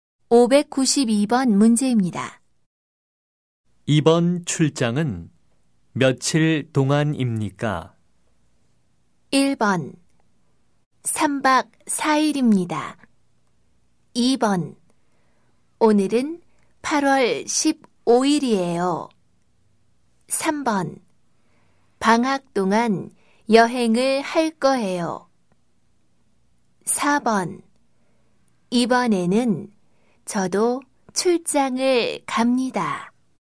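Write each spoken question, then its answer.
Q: 이번 출장은 며칠 동안입니까?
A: 1: 3박 4일입니다.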